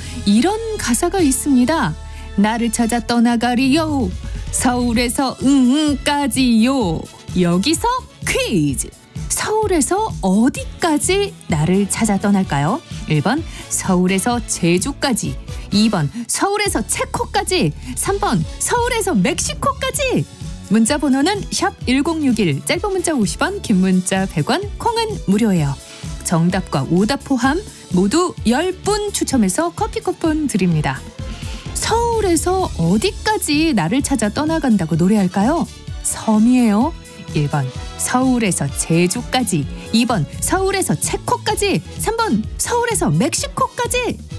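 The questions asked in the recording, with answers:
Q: 서울에서 어디까지 나를 찾아 떠날까요?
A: 1번: 서울에서 제주까지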